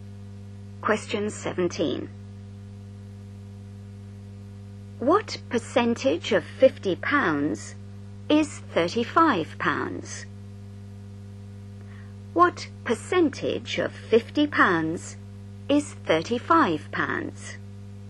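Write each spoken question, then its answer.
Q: What percentage of £50 is £35?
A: 70%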